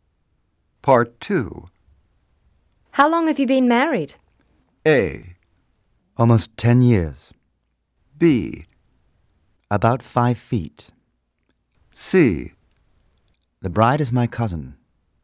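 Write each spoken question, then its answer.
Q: How long have you been married?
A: A: Almost 10 years.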